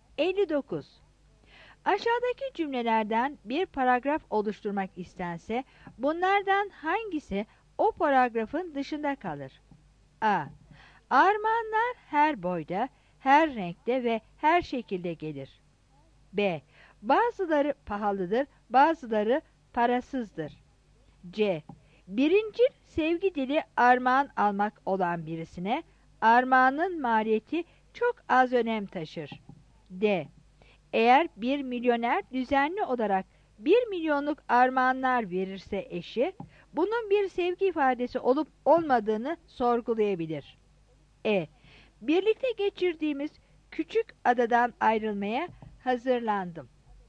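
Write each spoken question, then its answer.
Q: Aşağıdaki cümlelerden bir paragraf oluşturmak istense bunlardan hangisi o paragrafın dışında kalır?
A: E: Birlikte geçirdiğimiz küçük adadan ayrılmaya hazırlandım.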